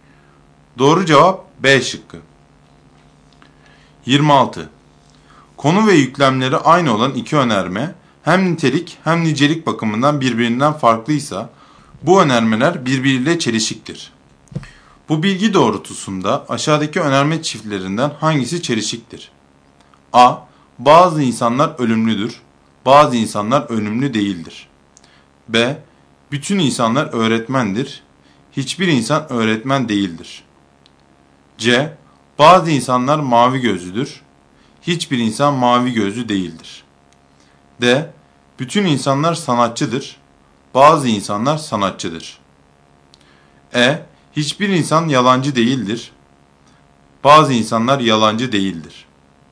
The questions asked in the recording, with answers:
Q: Bu bilgi doğrultusunda aşağıdaki önerme çiftlerinden hangisi çelişiktir?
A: Doğru cevap C şıkkı.